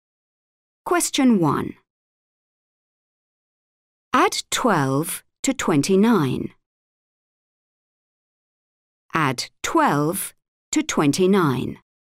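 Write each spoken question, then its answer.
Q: Add 12 to 29.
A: 41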